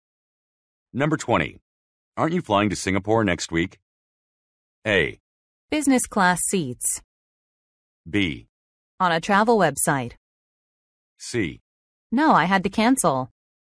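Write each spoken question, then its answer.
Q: Aren't you flying to Singapore next week?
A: C: No, I had to cancel.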